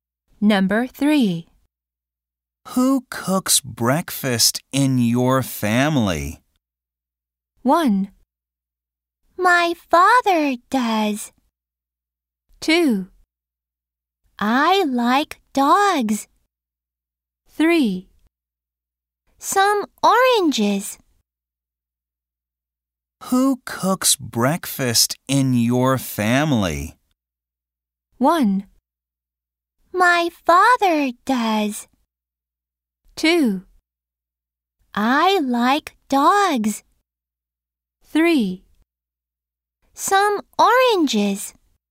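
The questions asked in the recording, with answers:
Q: Who cooks breakfast in your family?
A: 1: My father does.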